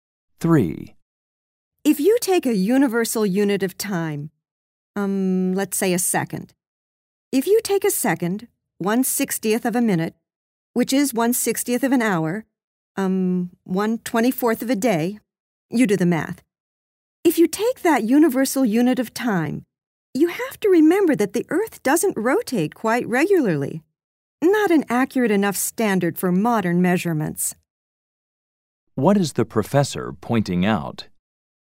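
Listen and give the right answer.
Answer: The Earth's rotation is irregular, so a second based on the day isn't an accurate enough standard for modern measurements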